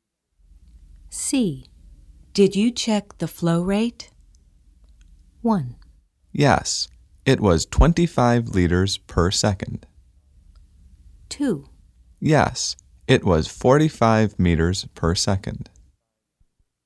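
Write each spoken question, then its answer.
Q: Did you check the flow rate?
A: 1: Yes, it was 25 liters per second.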